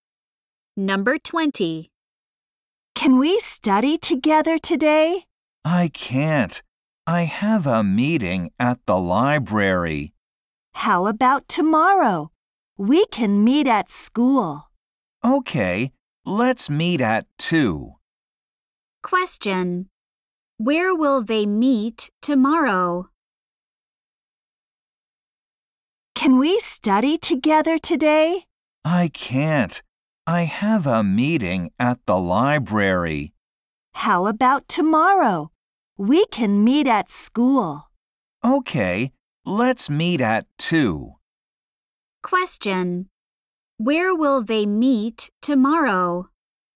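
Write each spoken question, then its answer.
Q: Where will they meet tomorrow?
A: At school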